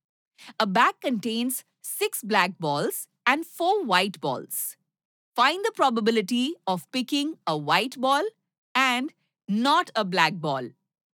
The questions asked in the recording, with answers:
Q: Find the probability of picking a white ball and not a black ball.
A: The probability of getting a white ball is 4 by 10, simplified to 2 by 5.